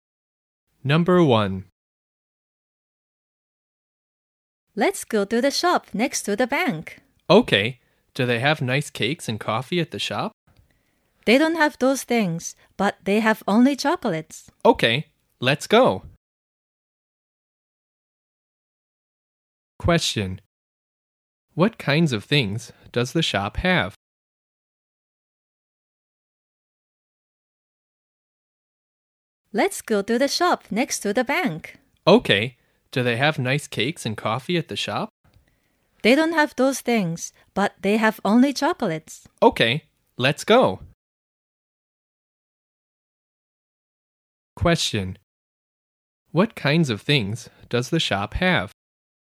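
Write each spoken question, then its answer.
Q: What kinds of things does the shop have?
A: Only chocolates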